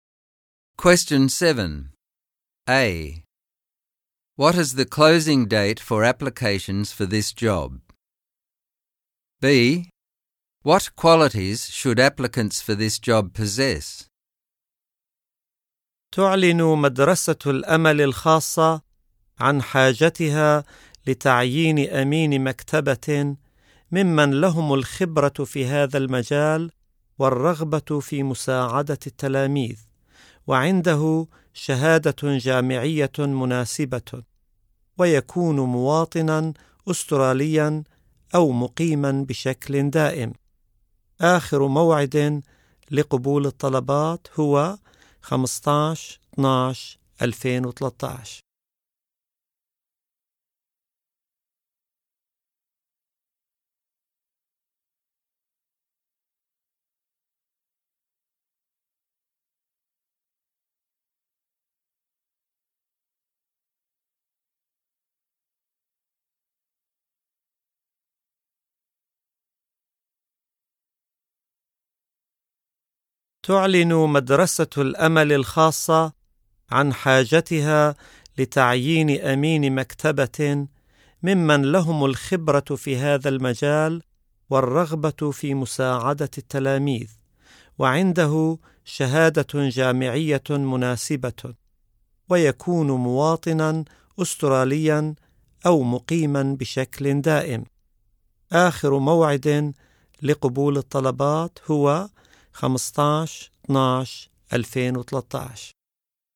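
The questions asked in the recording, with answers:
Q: A. What is the closing date for applications for this job?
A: 15/12/2013

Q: B. What qualities should applicants for this job possess?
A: Experience as a librarian, a wish to help students, a suitable university degree, Australian citizenship or permanent residency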